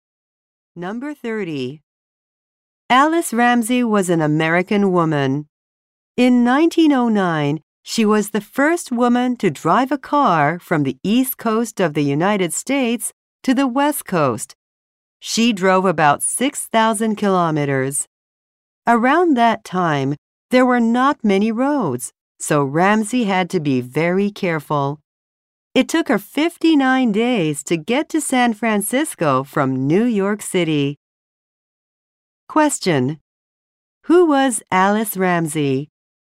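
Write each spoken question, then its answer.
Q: Who was Alice Ramsey?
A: The first woman to drive across the US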